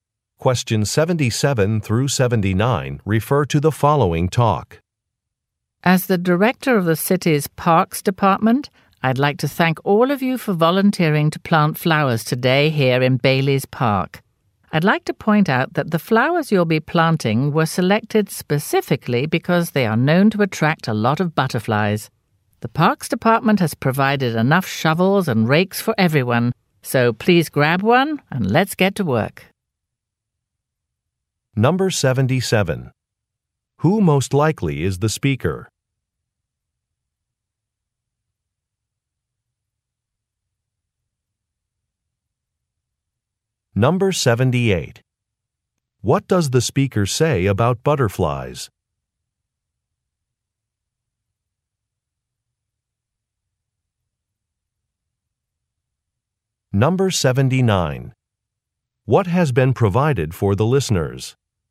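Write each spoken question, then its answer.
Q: Who most likely is the speaker?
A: The director of the city's Parks Department

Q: What does the speaker say about butterflies?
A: The flowers attract them

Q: What has been provided for the listeners?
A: Shovels and rakes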